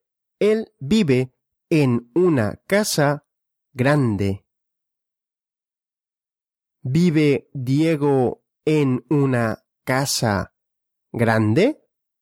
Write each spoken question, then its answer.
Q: ¿Vive Diego en una casa grande?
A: Sí, Diego vive en una casa grande.